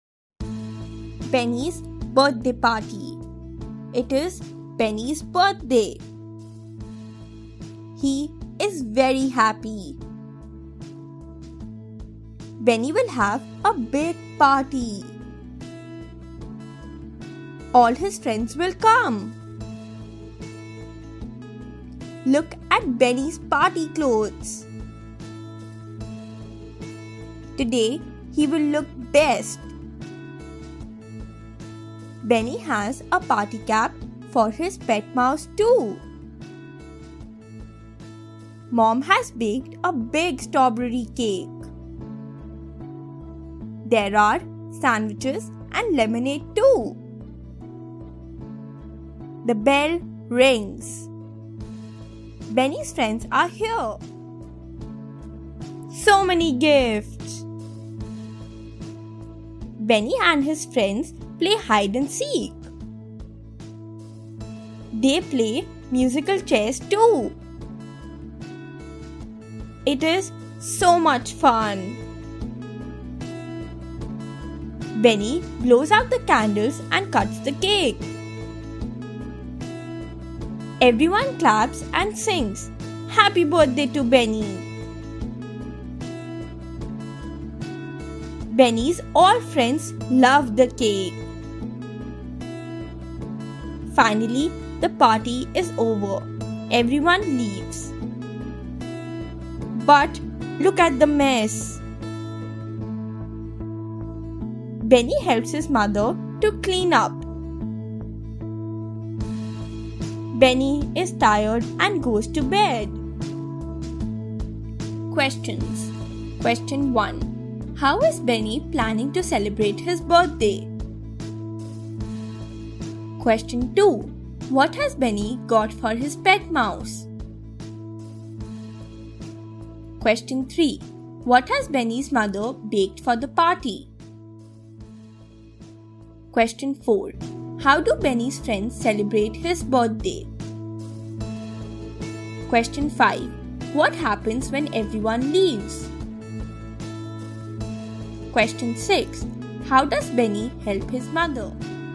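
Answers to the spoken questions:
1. He will have a big party with all his friends.
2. A party cap.
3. A big strawberry cake.
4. They play hide and seek and musical chairs, clap and sing Happy Birthday.
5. There is a big mess.
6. He helps her clean up.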